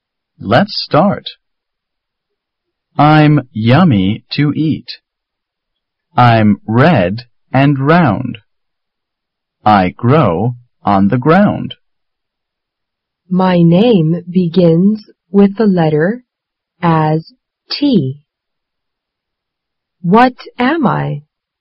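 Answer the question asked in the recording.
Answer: A tomato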